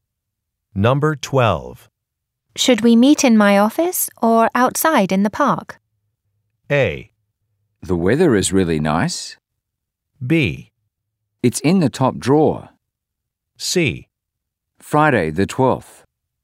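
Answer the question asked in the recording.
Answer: A: The weather is really nice.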